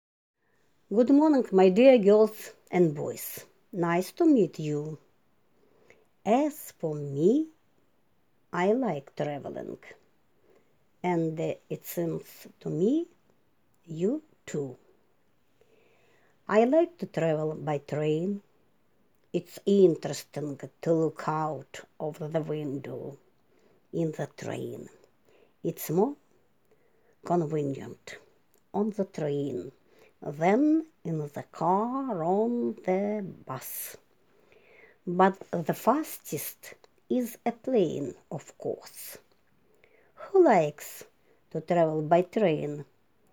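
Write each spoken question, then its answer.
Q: Who likes to travel by train?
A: The speaker (the teacher) likes to travel by train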